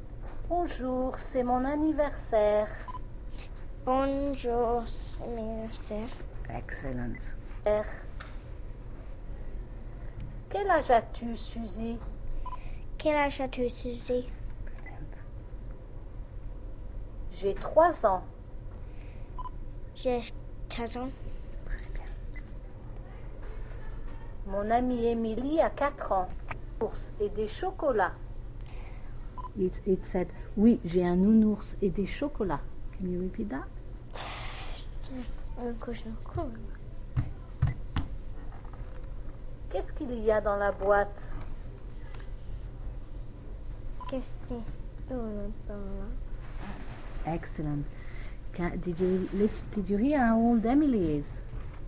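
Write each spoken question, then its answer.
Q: Did you hear how old Emily is?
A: 4 years old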